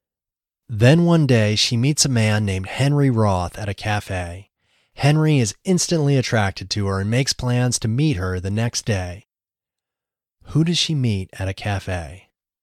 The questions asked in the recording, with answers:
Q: Who does she meet at a cafe?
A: She meets Henry Roth at a cafe.